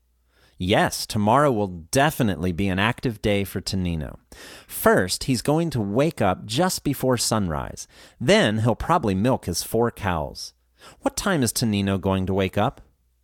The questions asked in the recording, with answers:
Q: What time is Tonino going to wake up?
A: He's going to wake up before sunrise.